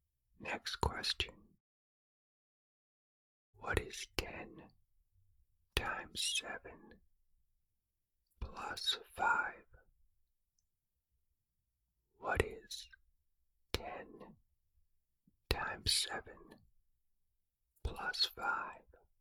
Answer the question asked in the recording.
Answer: The answer is 75.